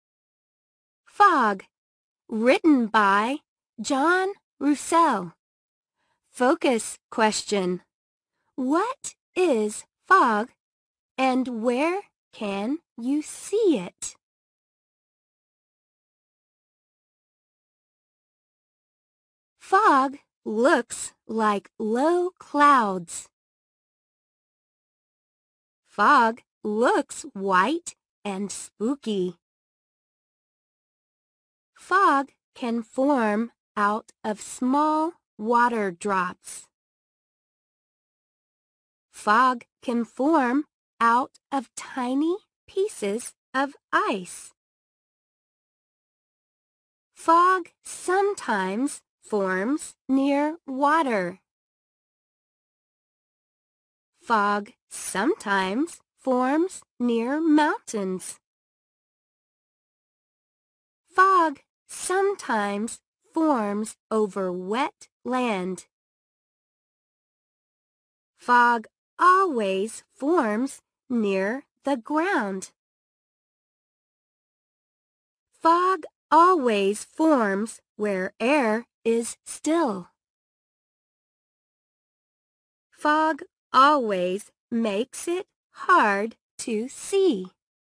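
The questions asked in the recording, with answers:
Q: What is fog and where can you see it?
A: Fog looks like low clouds and forms from small water drops or tiny pieces of ice. You can see it near water, near mountains, over wet land and always near the ground.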